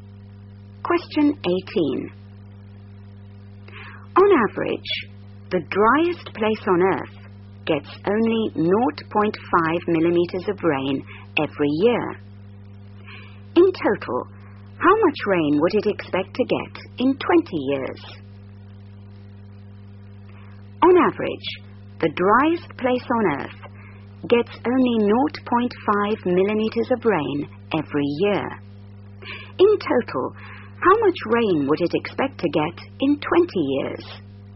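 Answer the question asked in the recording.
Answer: 10 mm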